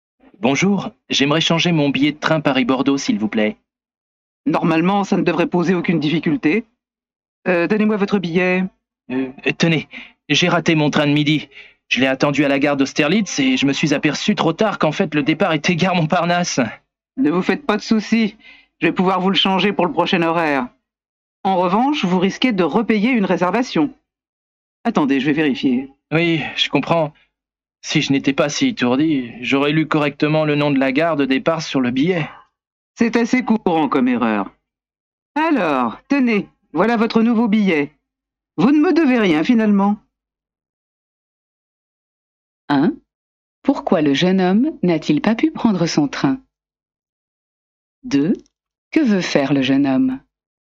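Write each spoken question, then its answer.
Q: Pourquoi le jeune homme n'a-t-il pas pu prendre son train ?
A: Il s'est trompé de gare : il a attendu à Austerlitz alors que le départ était à Montparnasse.

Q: Que veut faire le jeune homme ?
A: Changer son billet de train Paris-Bordeaux.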